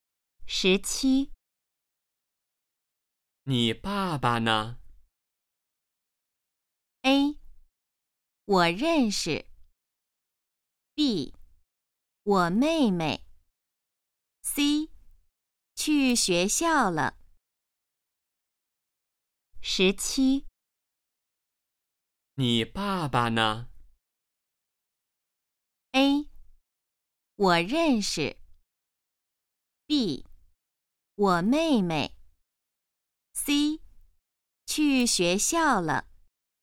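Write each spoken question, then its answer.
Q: 你爸爸呢?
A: C: 去学校了。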